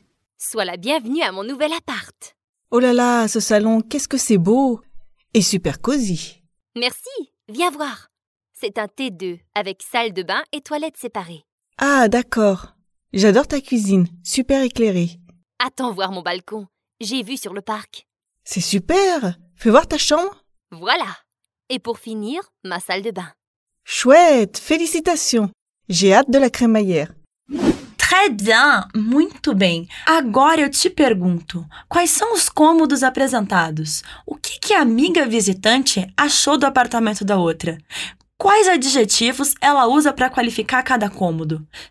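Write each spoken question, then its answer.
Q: quais são os cômodos apresentados?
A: Sala, cozinha, varanda (balcon), quarto e banheiro (salle de bain)

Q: O que, que a amiga visitante achou do apartamento da outra?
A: Adorou; achou lindo e aconchegante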